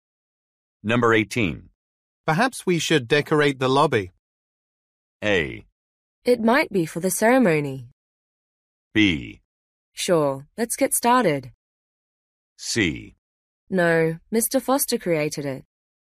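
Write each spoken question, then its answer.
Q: Perhaps we should decorate the lobby.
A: B: Sure, let's get started.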